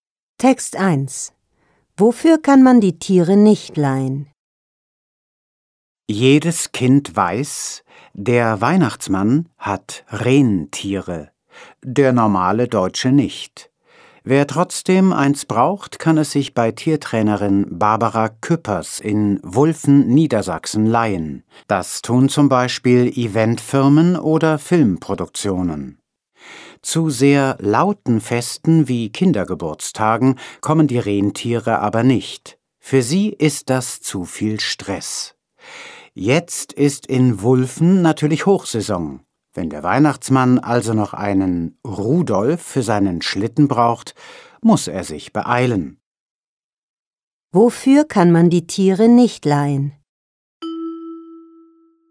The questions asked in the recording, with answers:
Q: Wofür kann man die Tiere nicht leihen?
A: Für laute Feste kann man die Tiere nicht leihen, denn dort ist es zu laut für die Tiere.